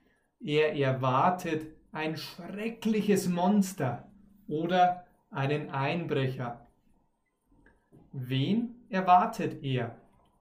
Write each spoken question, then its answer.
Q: Wen erwartet er?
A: ein schreckliches Monster oder einen Einbrecher.